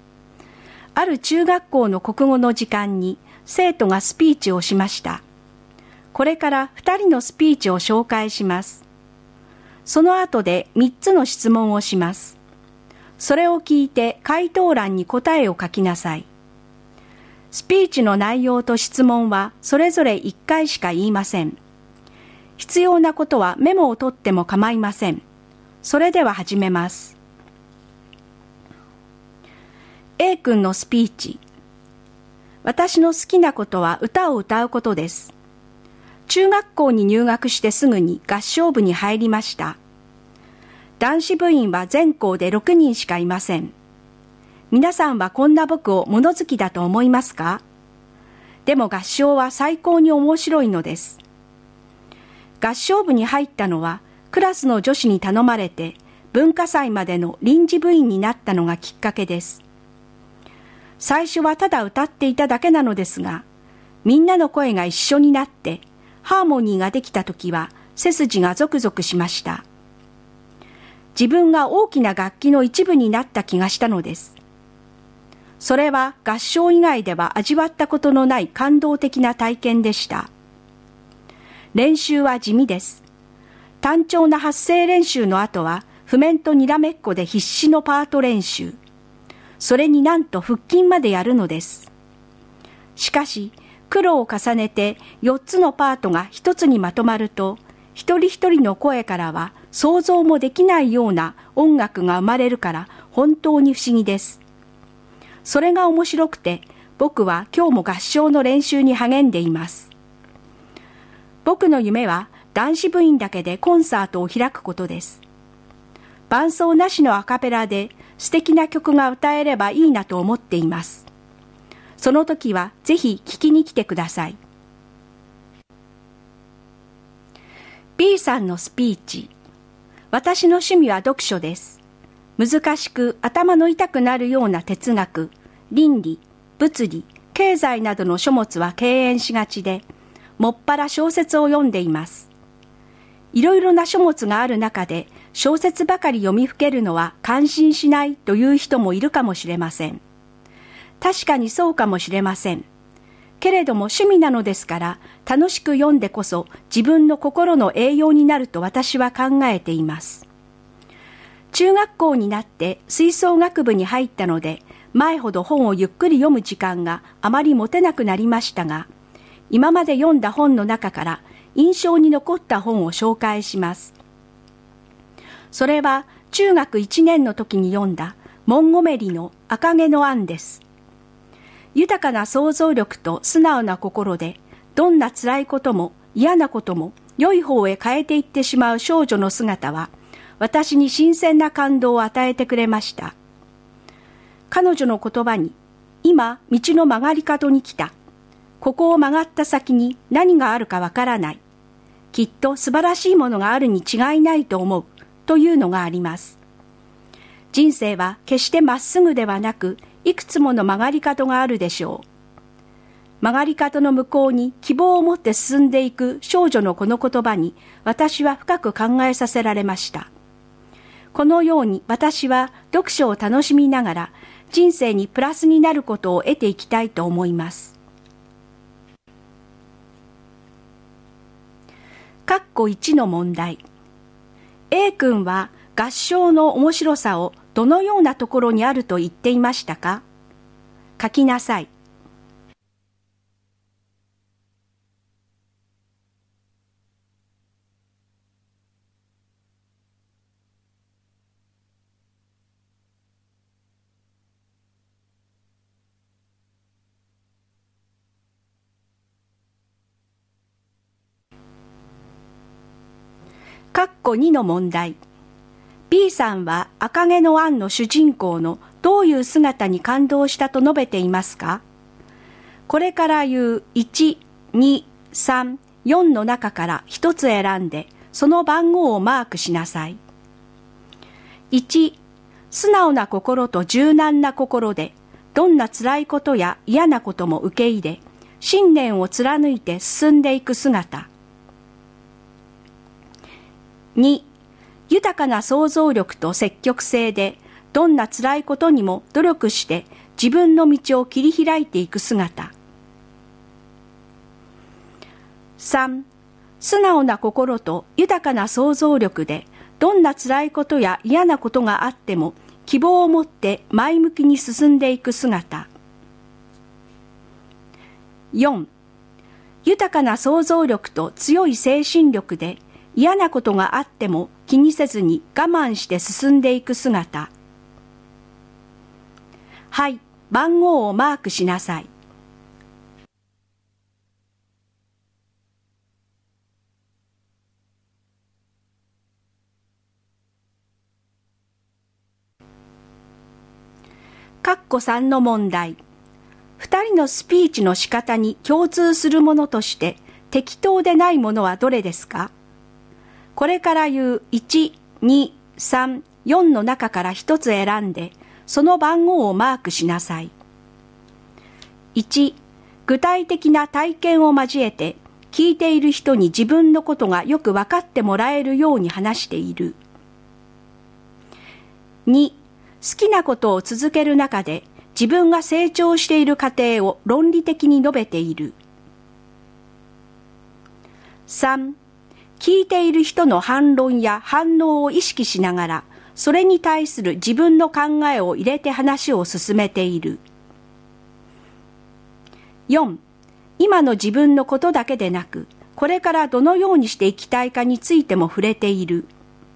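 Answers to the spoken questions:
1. 4つのパートが1つにまとまると、一人一人の声からは想像もできないような音楽が生まれるところ
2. 3: 素直な心と豊かな想像力で、どんな辛いことや嫌なことがあっても希望を持って前向きに進んでいく姿。
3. 2: 好きなことを続ける中で、自分が成長している過程を論理的に述べている。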